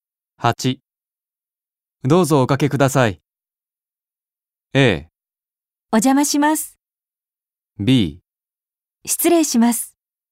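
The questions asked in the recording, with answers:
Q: どうぞおかけください。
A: B: 失礼します。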